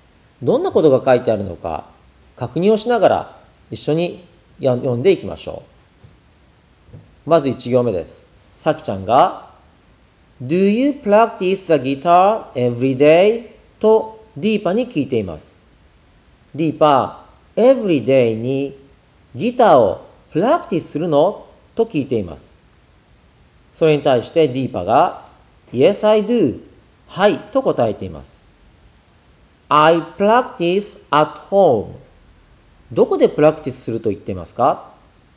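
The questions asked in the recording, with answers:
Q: どこでプラクティスすると言っていますか?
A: 家で (at home)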